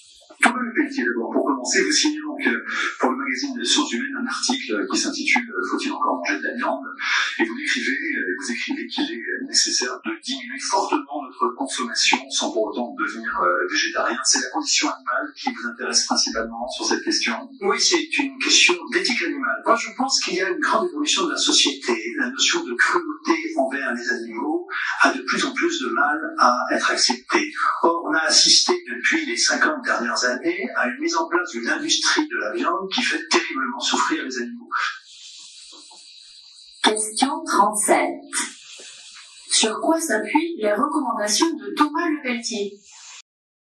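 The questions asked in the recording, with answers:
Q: Sur quoi s'appuient les recommandations de Thomas Leveltier ?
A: Sur l'éthique animale (la condition animale, la souffrance des animaux)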